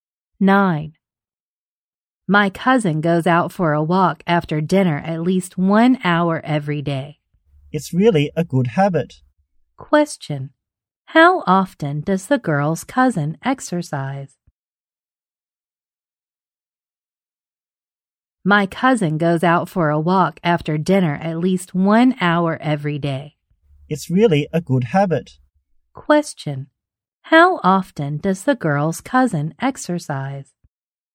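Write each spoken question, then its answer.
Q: How often does the girl's cousin exercise?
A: Every day.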